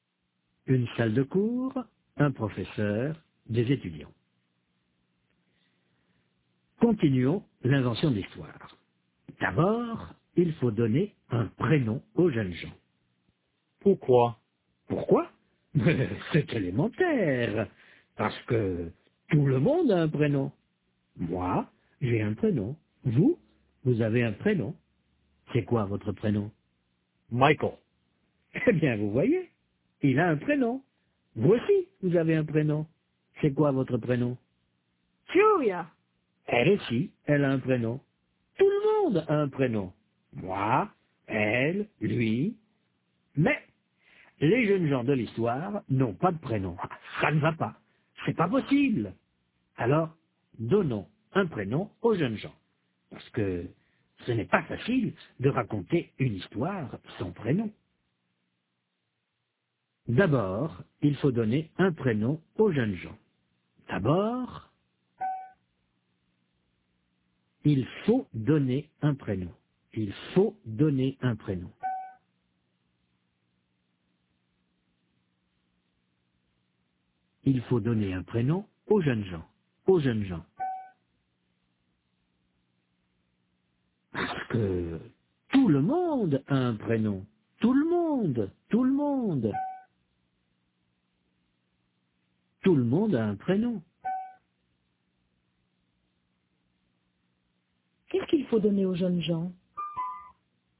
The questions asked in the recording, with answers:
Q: Qu'est-ce qu'il faut donner aux jeunes gens ?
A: Un prénom.